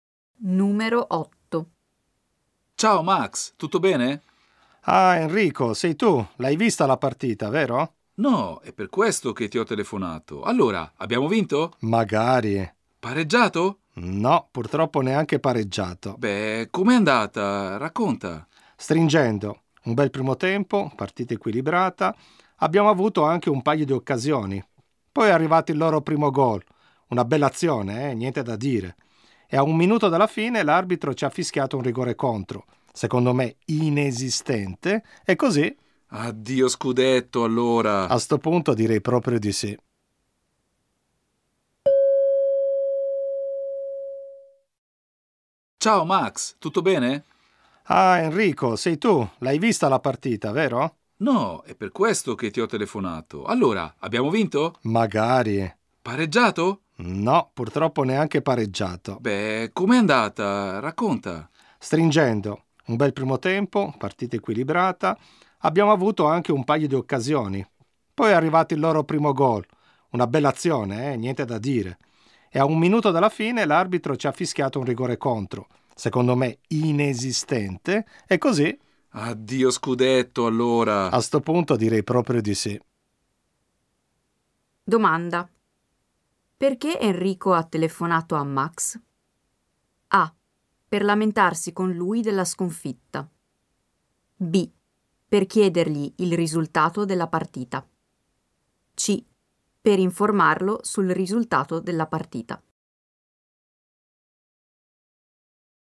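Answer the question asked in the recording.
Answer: B: Per chiedergli il risultato della partita.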